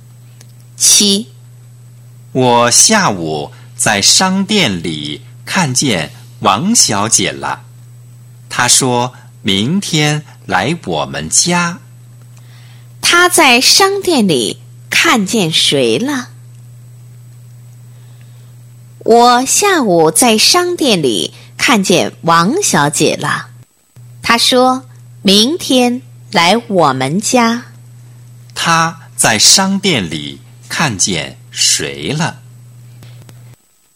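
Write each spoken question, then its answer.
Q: 她在商店里看见谁了?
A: 王小姐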